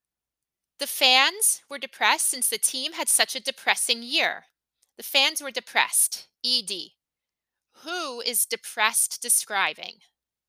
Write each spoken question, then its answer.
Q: Who is depressed describing?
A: The fans.